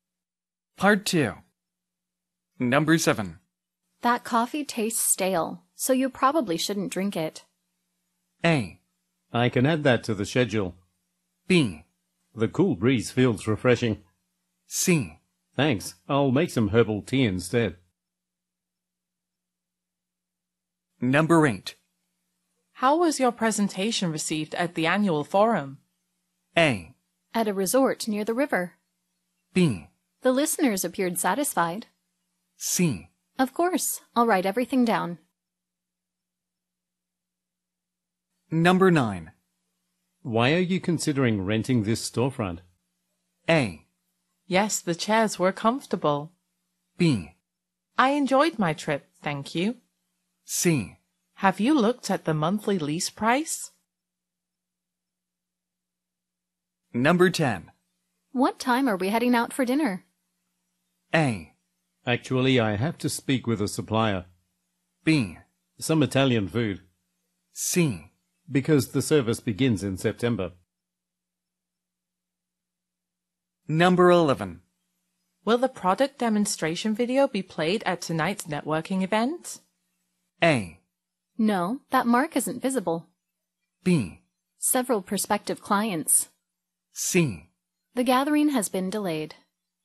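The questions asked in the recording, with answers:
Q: That coffee tastes stale, so you probably shouldn't drink it.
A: C: Thanks, I'll make some herbal tea instead.

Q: How was your presentation received at the annual forum?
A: B: The listeners appeared satisfied.

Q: Why are you considering renting this storefront?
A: C: Have you looked at the monthly lease price?

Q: What time are we heading out for dinner?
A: A: Actually, I have to speak with a supplier.

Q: Will the product demonstration video be played at tonight's networking event?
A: C: The gathering has been delayed.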